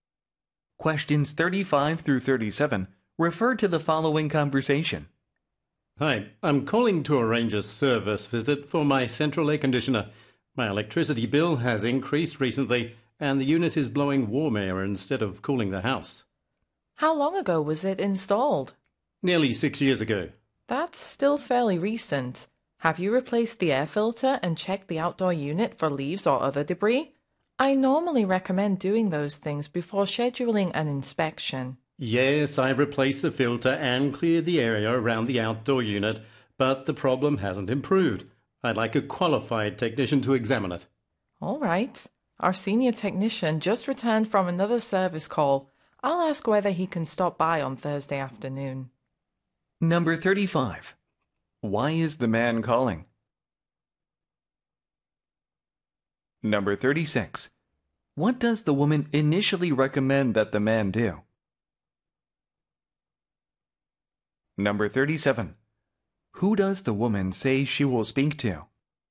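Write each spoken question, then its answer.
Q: Why is the man calling?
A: To arrange a service visit for his air conditioner

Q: What does the woman initially recommend that the man do?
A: Replace the air filter and check the outdoor unit for debris

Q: Who does the woman say she will speak to?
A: The senior technician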